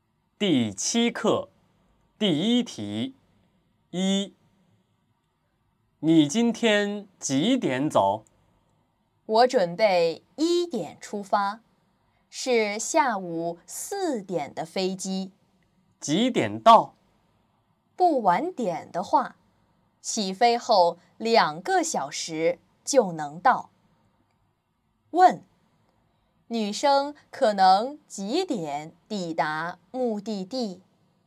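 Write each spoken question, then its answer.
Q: 问,女生可能几点抵达目的地?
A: 下午6点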